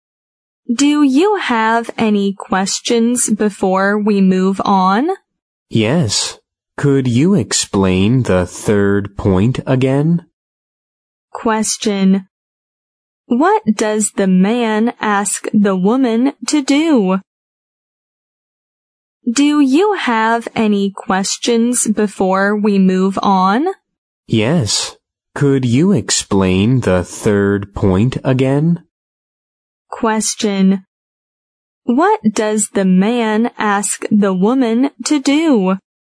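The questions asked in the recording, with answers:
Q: What does the man ask the woman to do?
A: Explain the third point again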